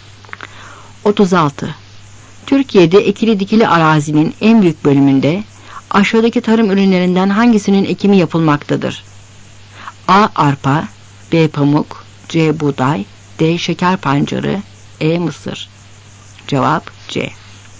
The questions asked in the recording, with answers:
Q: Türkiye'de ekili dikili arazinin en büyük bölümünde aşağıdaki tarım ürünlerinden hangisinin ekimi yapılmaktadır?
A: Cevap C.